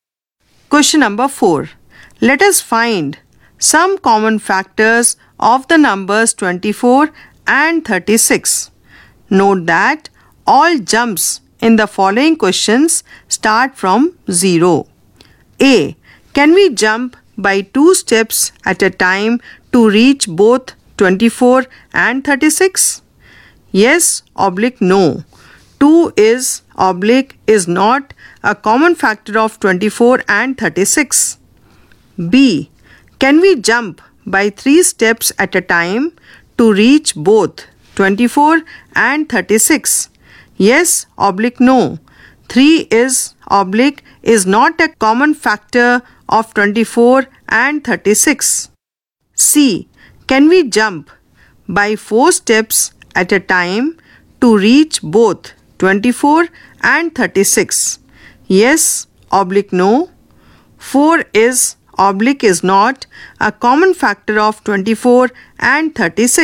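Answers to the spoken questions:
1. Yes
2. Yes
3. Yes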